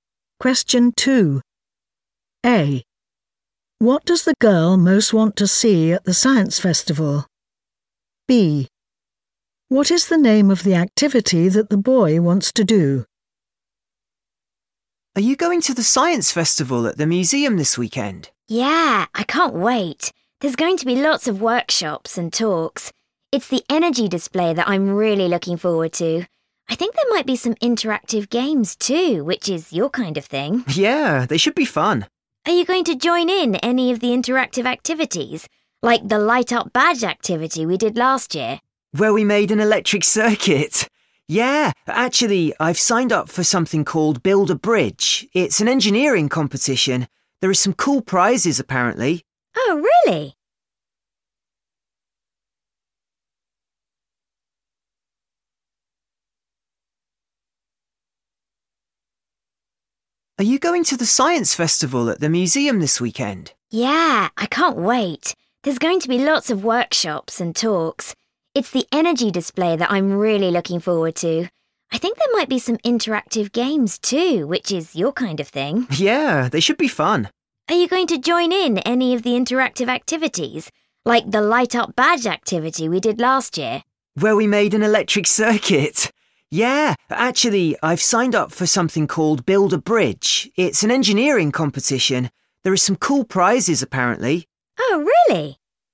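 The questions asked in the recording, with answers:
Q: What does the girl most want to see at the science festival?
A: the energy display

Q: What is the name of the activity that the boy wants to do?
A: Build a Bridge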